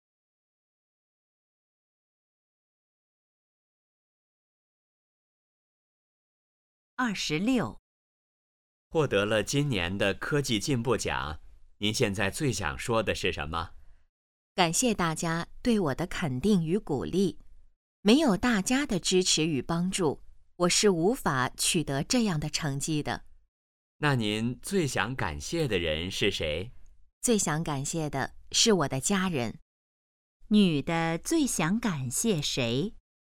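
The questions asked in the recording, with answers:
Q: 女的最想感谢谁?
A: 她的家人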